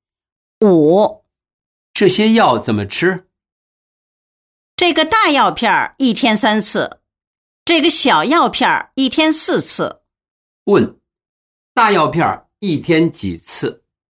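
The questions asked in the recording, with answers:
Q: 大药片一天几次?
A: 三次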